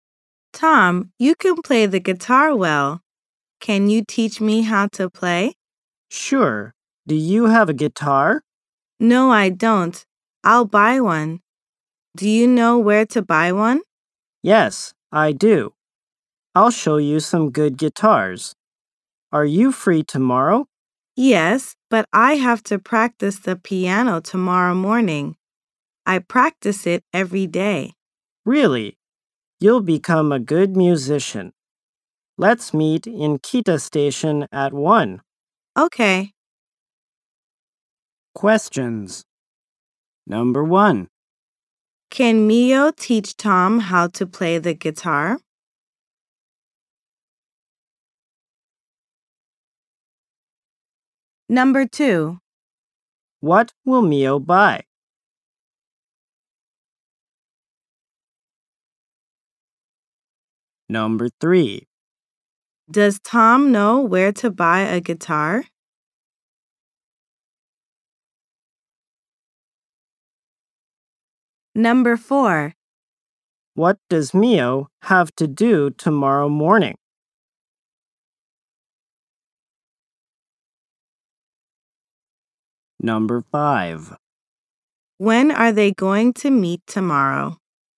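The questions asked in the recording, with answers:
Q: Can Mio teach Tom how to play the guitar?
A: No, she can't.

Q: What will Mio buy?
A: A guitar.

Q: Does Tom know where to buy a guitar?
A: Yes, he does.

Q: When are they going to meet tomorrow?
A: At 1.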